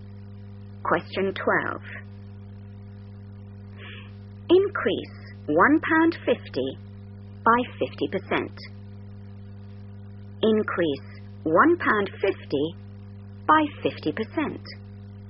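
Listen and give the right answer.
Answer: £2.25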